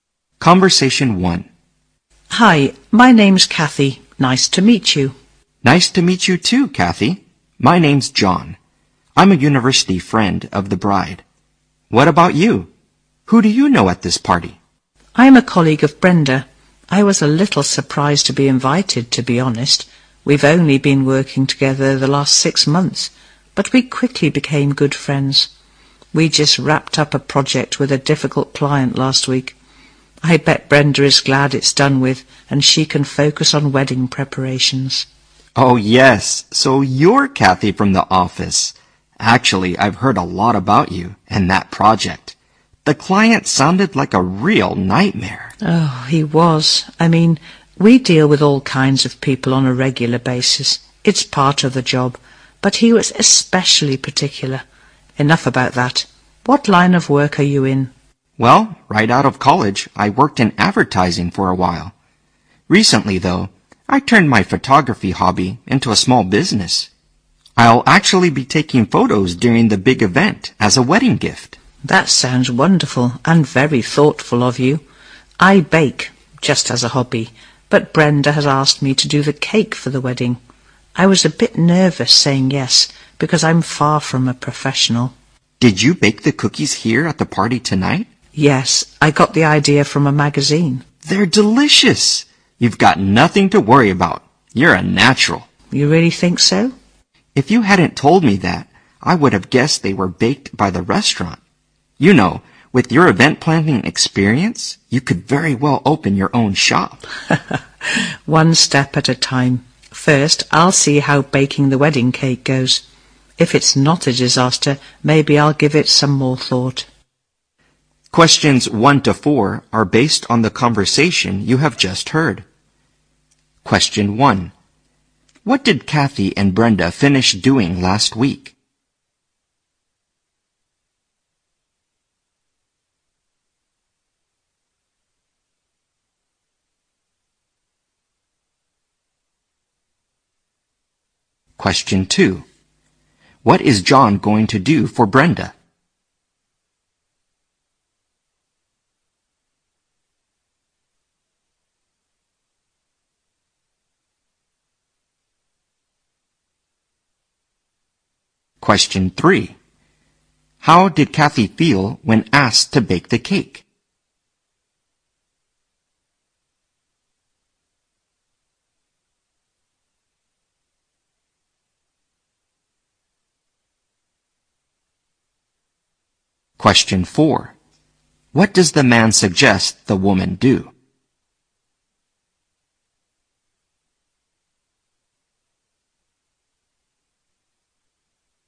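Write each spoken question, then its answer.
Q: What did Kathy and Brenda finish doing last week?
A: A project with a difficult client

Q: What is John going to do for Brenda?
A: Take photos at her wedding as a gift

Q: How did Kathy feel when asked to bake the cake?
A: Nervous

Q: What does the man suggest the woman do?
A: Open her own shop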